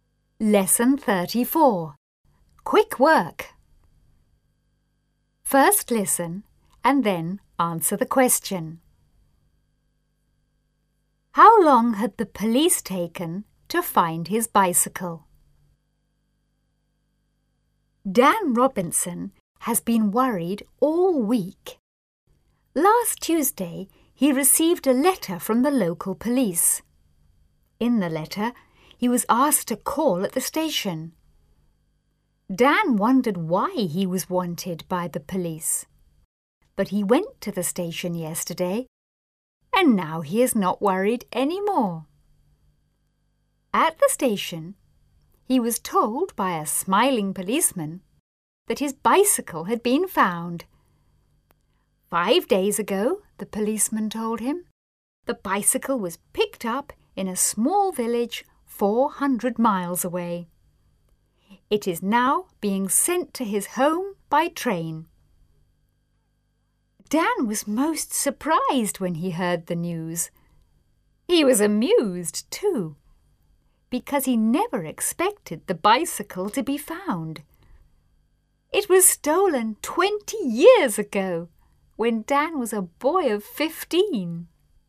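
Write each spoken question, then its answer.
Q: How long had the police taken to find his bicycle?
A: About 20 years (it was stolen 20 years ago)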